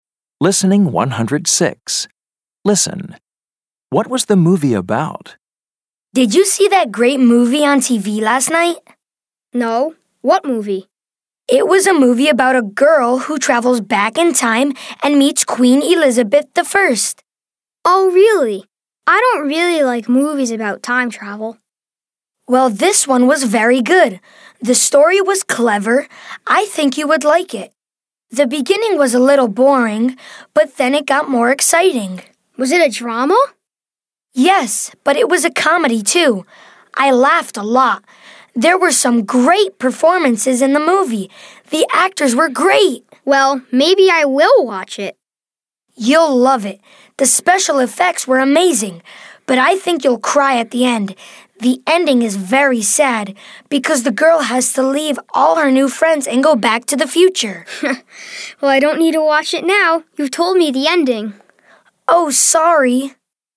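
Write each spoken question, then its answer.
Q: What was the movie about?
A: A girl who travels back in time and meets Queen Elizabeth I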